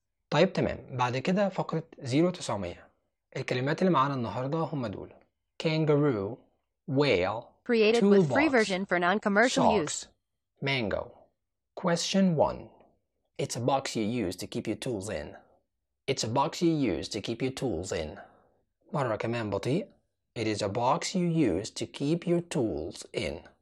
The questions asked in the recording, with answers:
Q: It's a box you use to keep your tools in.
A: الإجابة هي toolbox.